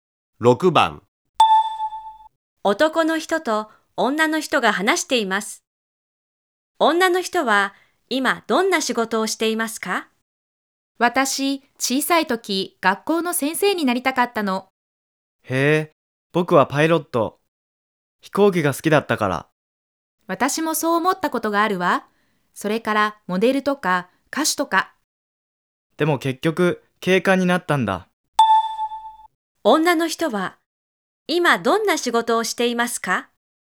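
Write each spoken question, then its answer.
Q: 女の人は今どんな仕事をしていますか?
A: 警官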